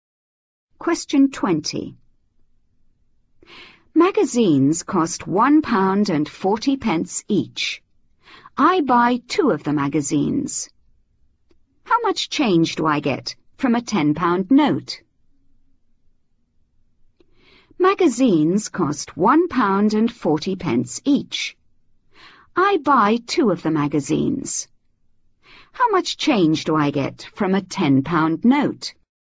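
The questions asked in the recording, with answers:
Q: How much change do I get from a £10 note?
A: £7.20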